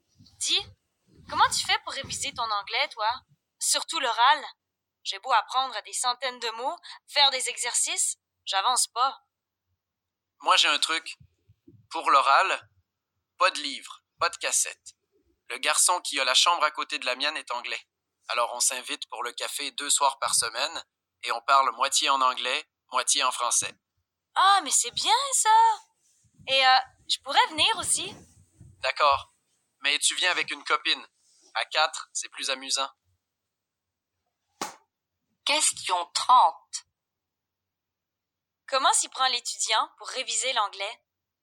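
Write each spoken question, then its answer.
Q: Comment s'y prend l'étudiant pour réviser l'anglais?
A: Il parle avec son voisin anglais, moitié en anglais, moitié en français, deux soirs par semaine.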